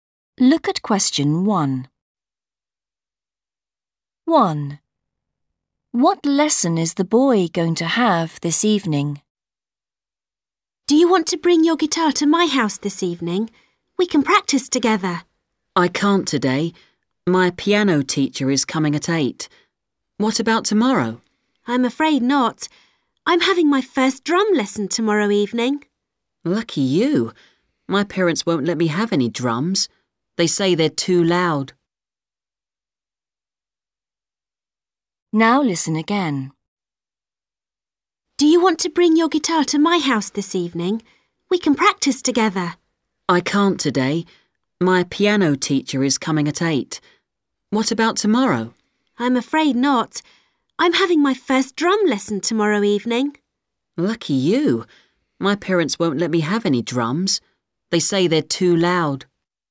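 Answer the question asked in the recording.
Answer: piano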